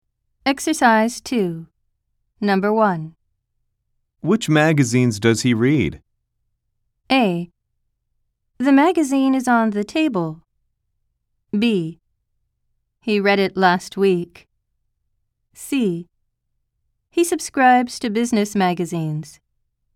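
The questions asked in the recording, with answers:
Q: Which magazines does he read?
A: C: He subscribes to business magazines.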